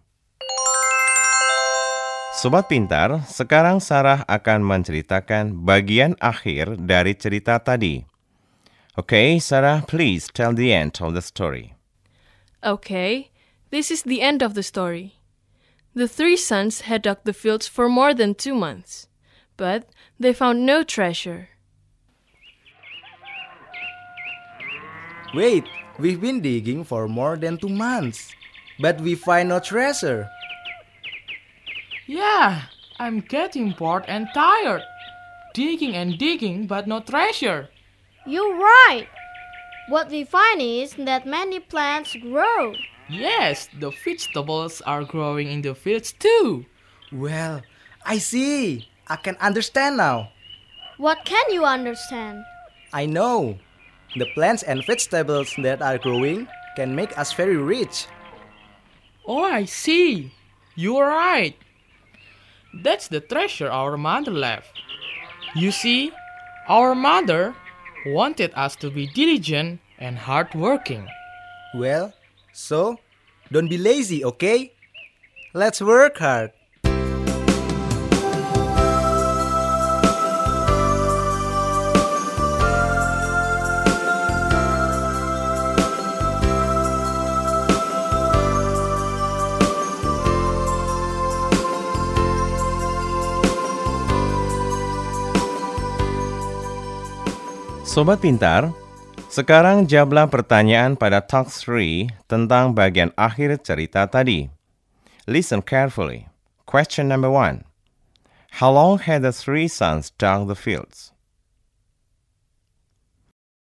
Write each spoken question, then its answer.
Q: How long had the three sons dug the fields?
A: More than 2 months. Right.